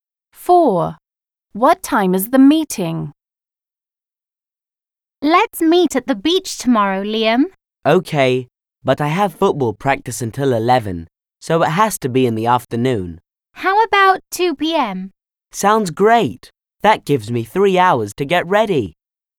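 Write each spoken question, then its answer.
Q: What time is the meeting?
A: 2 p.m.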